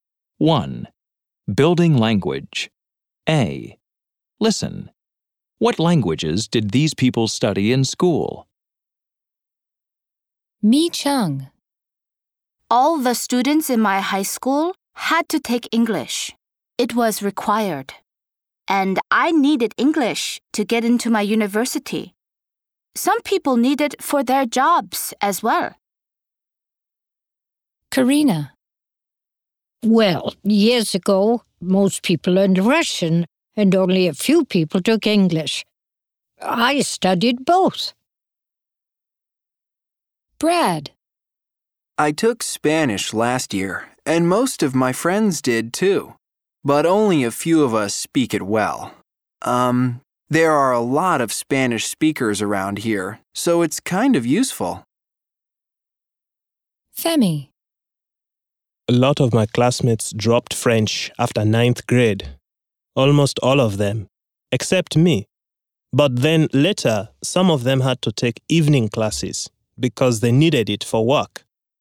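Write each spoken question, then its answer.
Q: What languages did these people study in school?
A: Mi Cheng: English; Karina: Russian and English; Brad: Spanish; Femi: French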